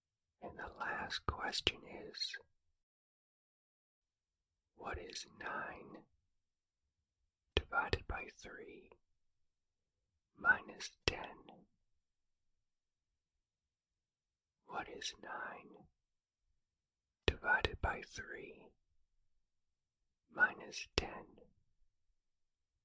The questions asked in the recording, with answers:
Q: What is 9 divided by 3 minus 10?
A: The answer is negative 7.